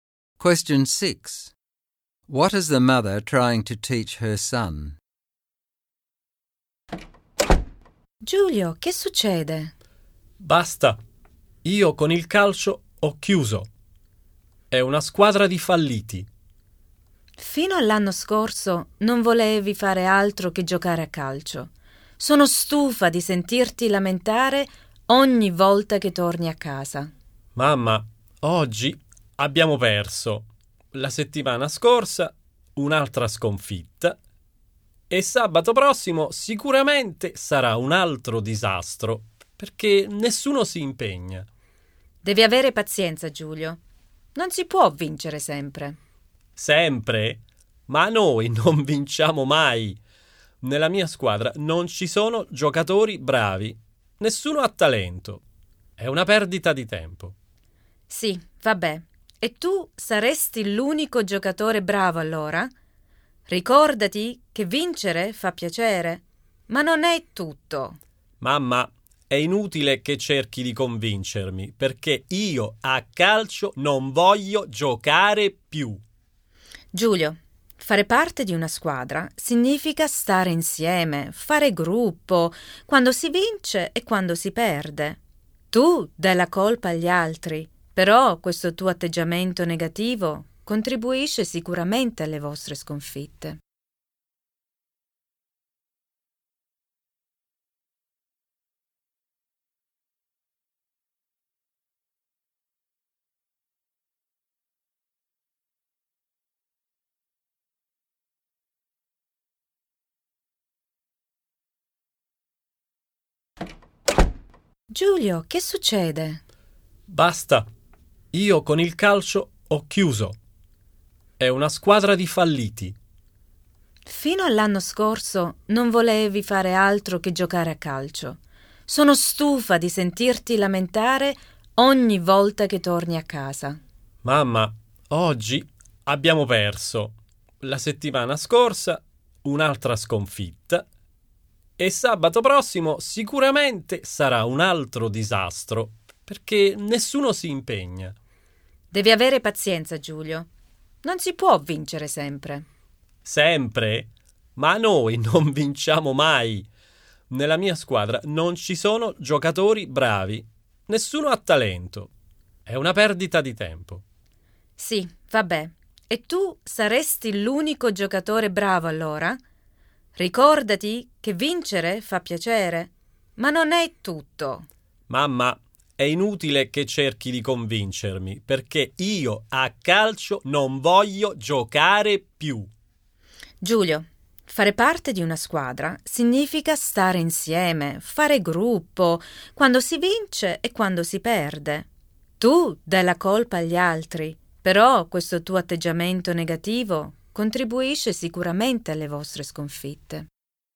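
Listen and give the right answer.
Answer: Being on a team means sticking together whether you win or lose. Winning isn't everything, and his negative attitude contributes to the team's defeats.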